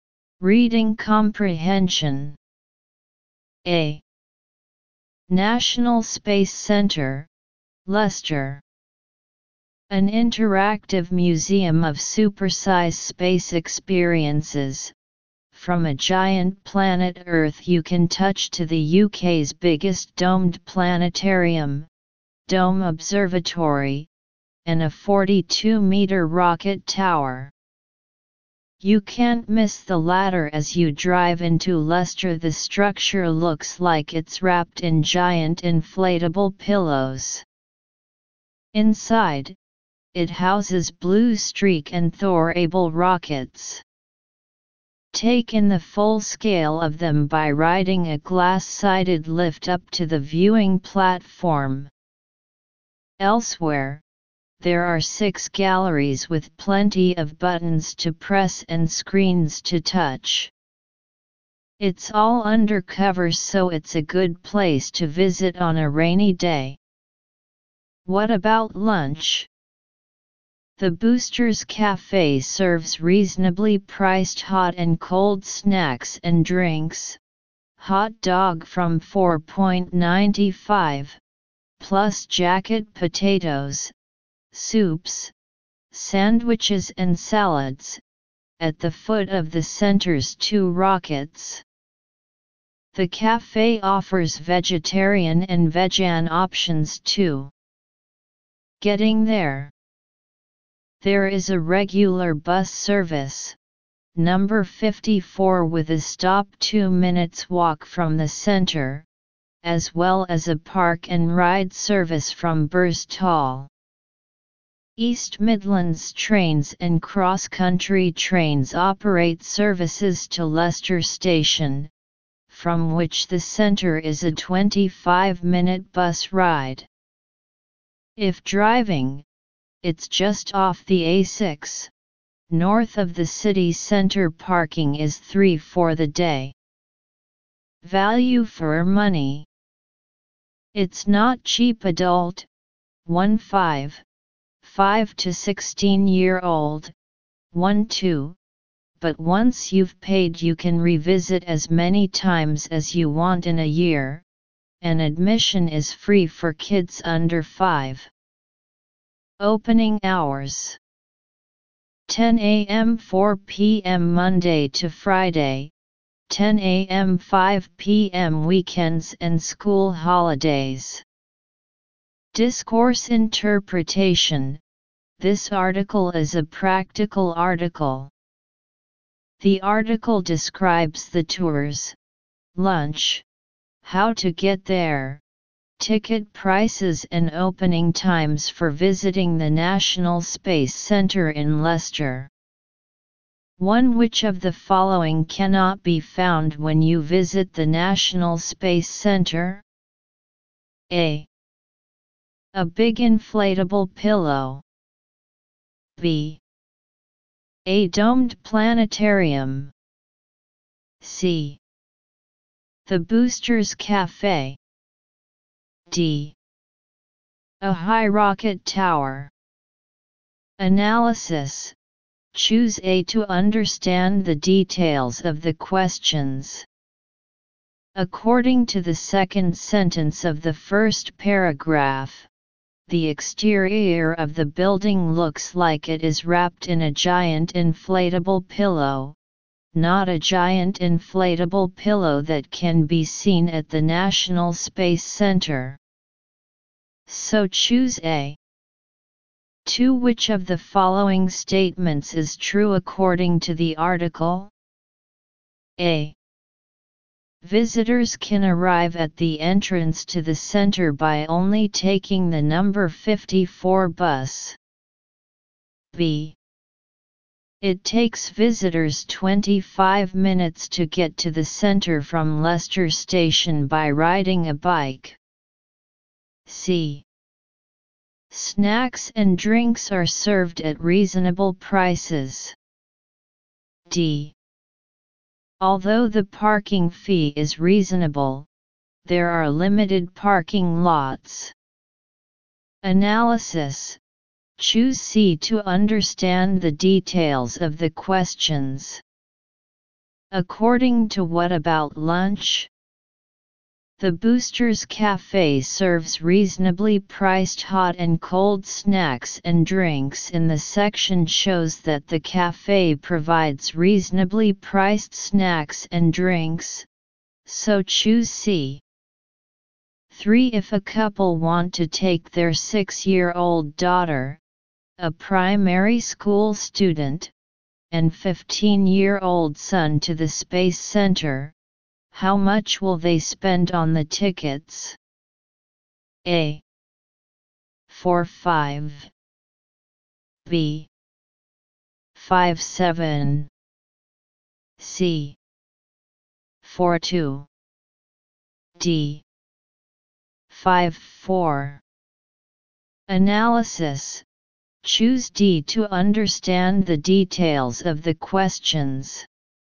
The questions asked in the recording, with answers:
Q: Which of the following cannot be found when you visit the National Space Center?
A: So choose A.

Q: Which of the following statements is true according to the article?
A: so choose C.